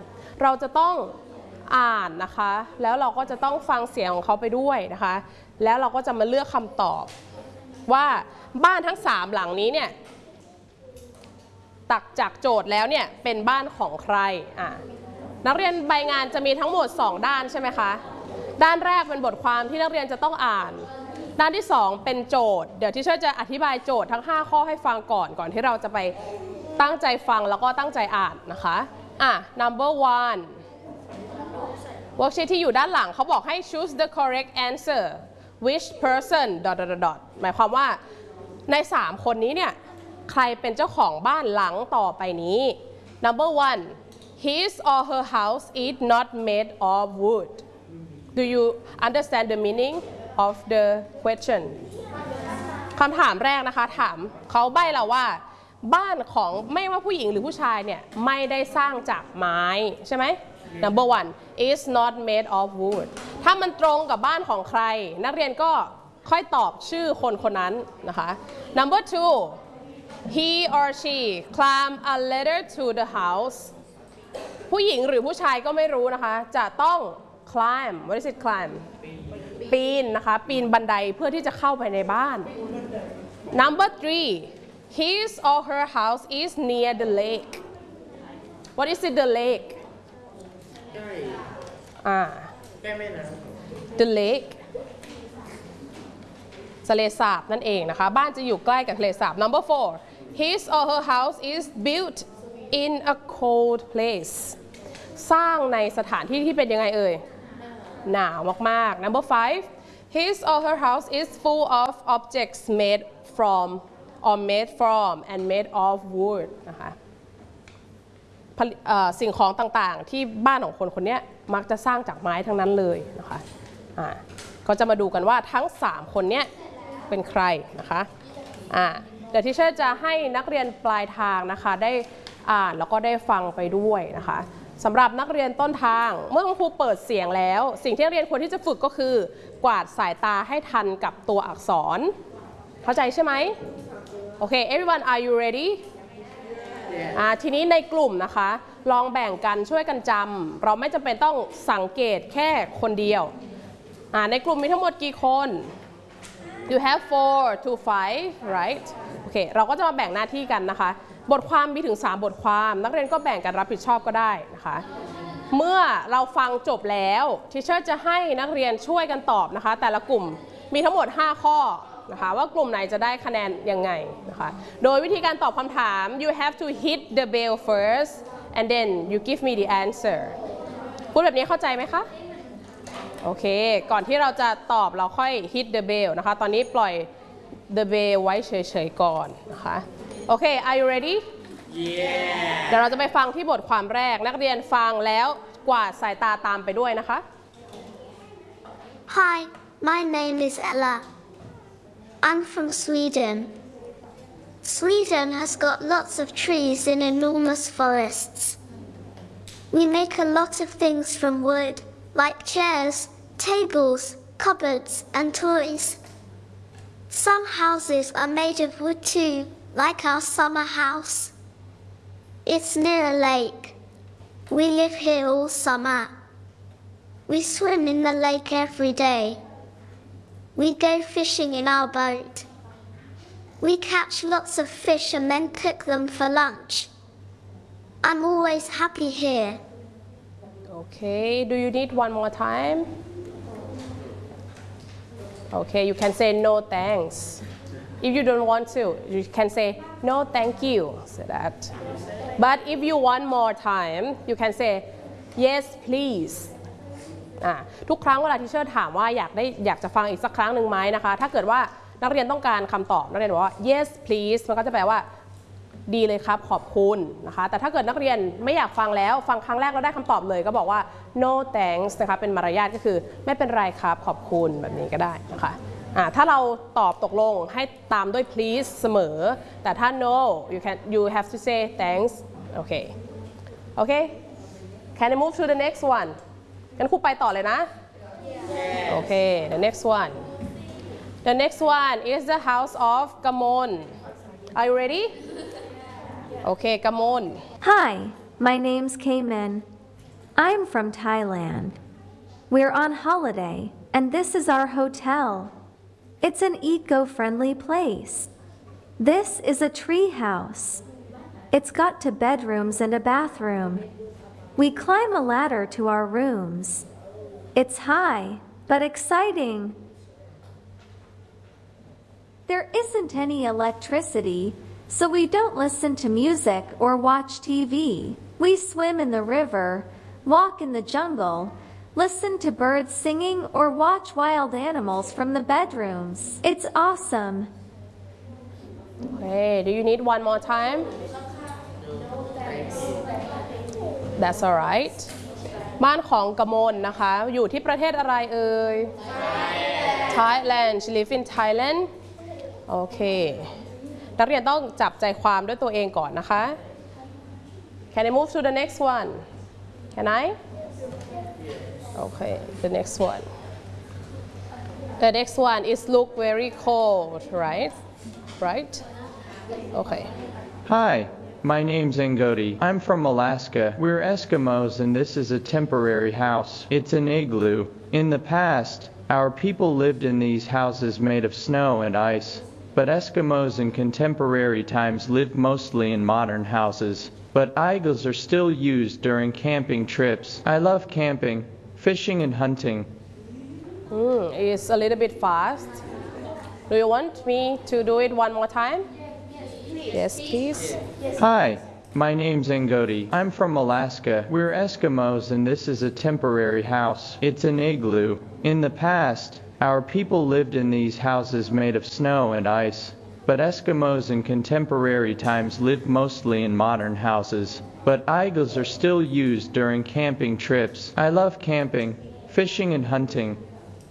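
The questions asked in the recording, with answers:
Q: his or her house is not made of wood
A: Ngodi

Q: he or she climb a ladder to the house.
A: Kamin

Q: his or her house is near the lake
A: Ella

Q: his or her house is built in a cold place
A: Ngodi

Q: His or her house is full of objects made from or made from and made of wood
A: Ella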